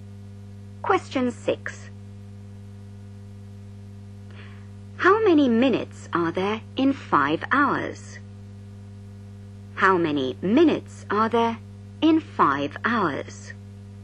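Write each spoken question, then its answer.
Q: How many minutes are there in 5 hours?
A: 300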